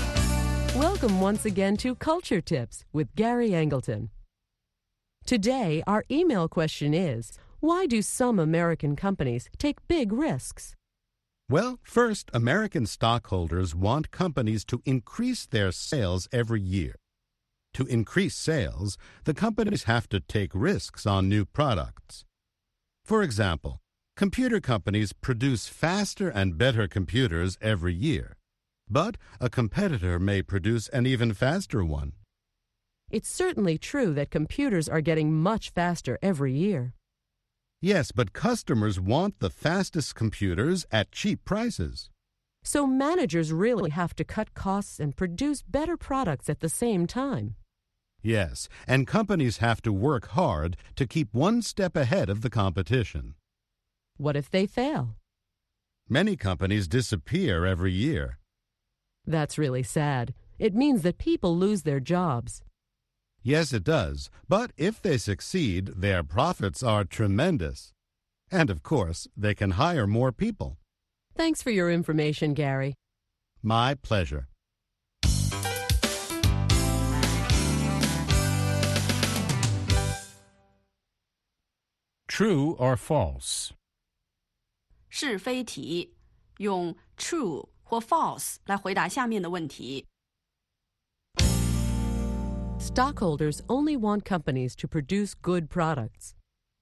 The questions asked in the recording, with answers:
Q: Stockholders only want companies to produce good products.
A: False. They also want the company to increase sales and make big profits.